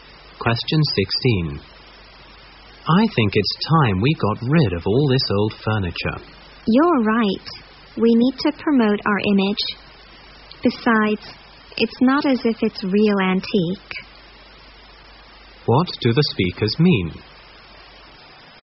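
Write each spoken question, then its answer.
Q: What do the speakers mean?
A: They agree to get rid of the old furniture because it is not real antique and they need to improve their image.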